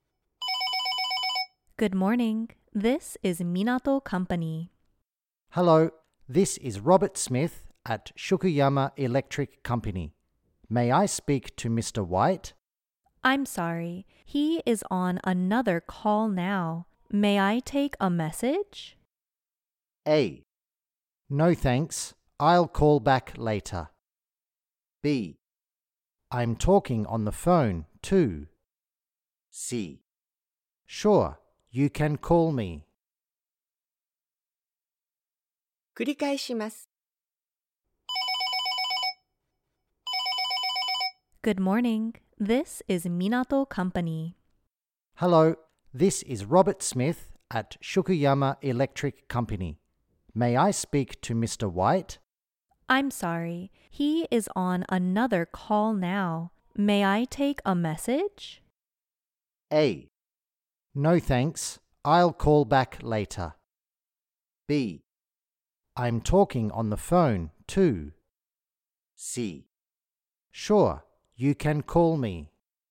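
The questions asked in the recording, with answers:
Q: May I take a message?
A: A: No thanks. I'll call back later.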